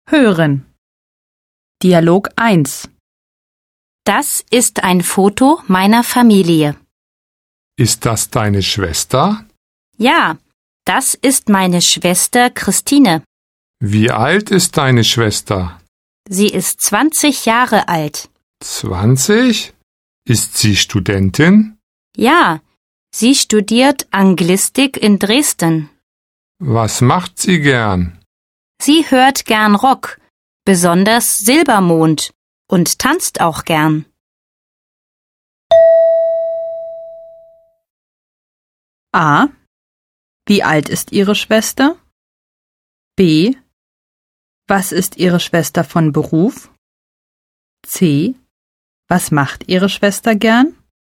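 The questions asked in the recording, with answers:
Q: Wie alt ist Ihre Schwester?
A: Sie ist 20 Jahre alt.

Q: Was ist Ihre Schwester von Beruf?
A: Sie ist Studentin (Anglistik in Dresden).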